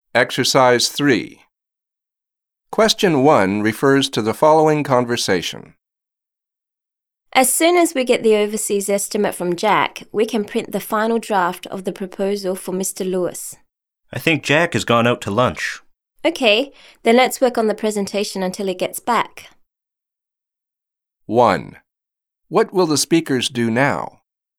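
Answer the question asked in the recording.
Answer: Work on the presentation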